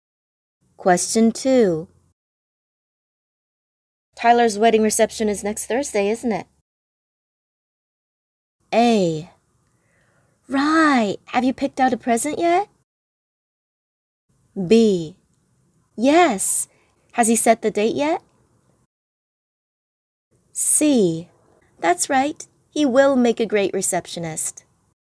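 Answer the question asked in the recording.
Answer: A: Right, have you picked out a present yet?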